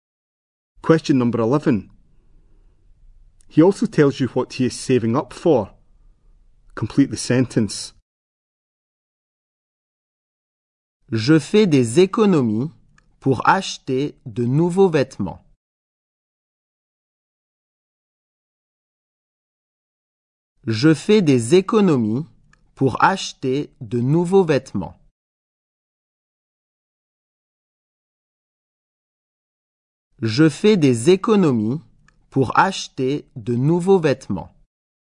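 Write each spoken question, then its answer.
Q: He also tells you what he is saving up for.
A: New clothes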